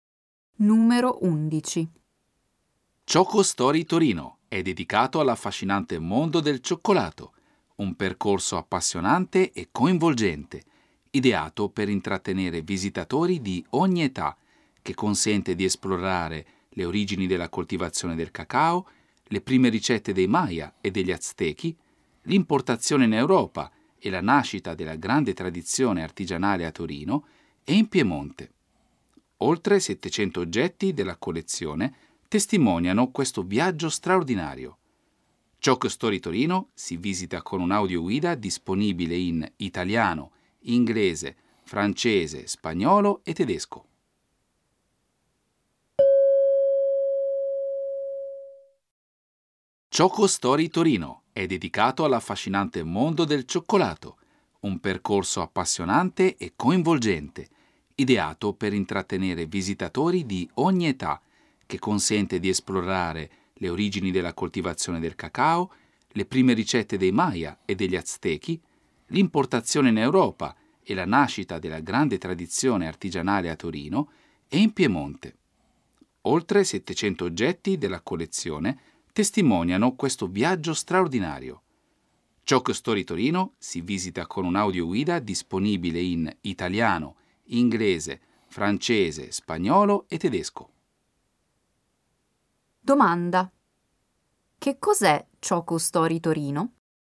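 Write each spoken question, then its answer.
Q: che cos'è Choco Story Torino?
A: Un museo dedicato al cioccolato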